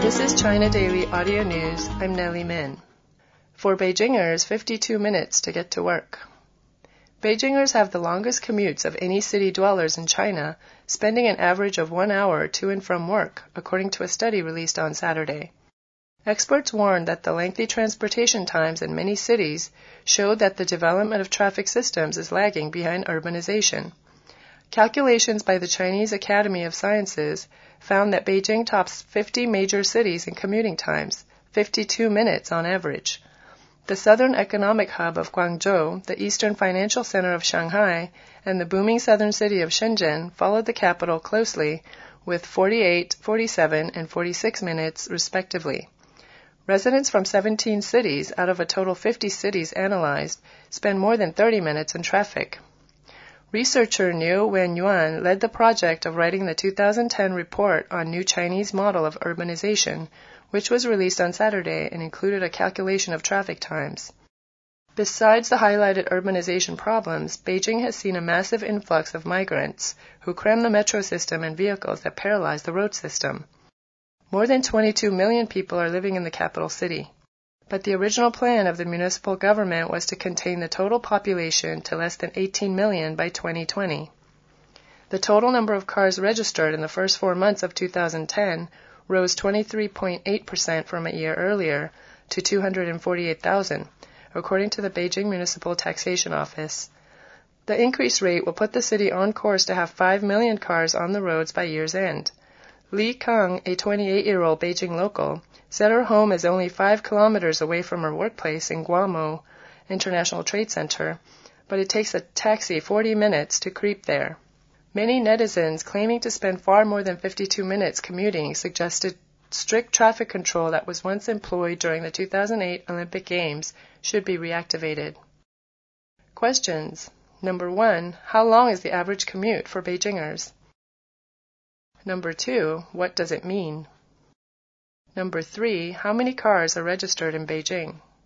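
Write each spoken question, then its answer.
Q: How long is the average commute for Beijingers?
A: 52 minutes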